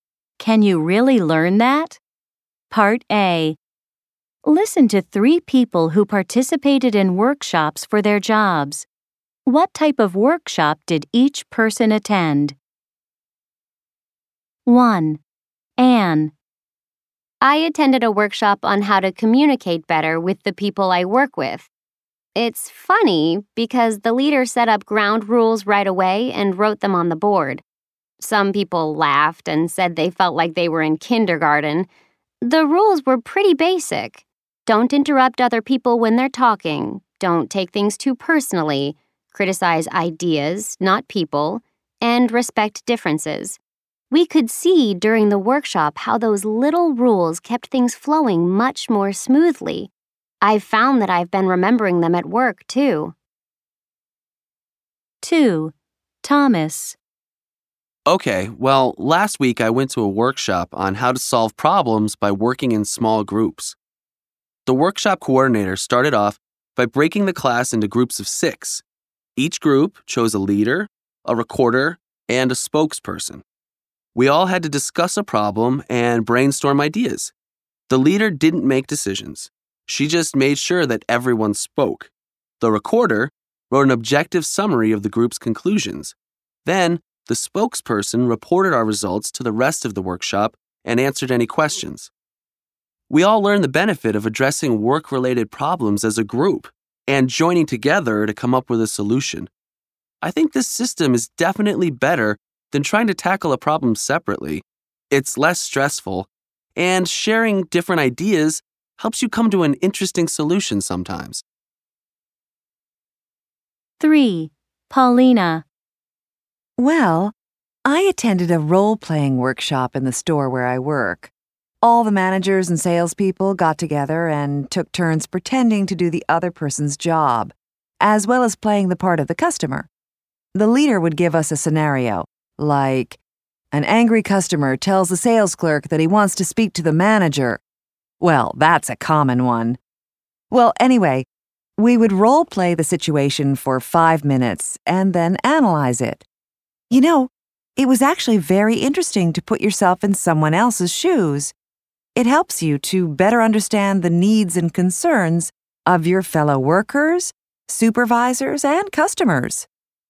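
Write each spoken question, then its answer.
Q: What type of workshop did each person attend? 1. Anne.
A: A workshop on how to communicate better with coworkers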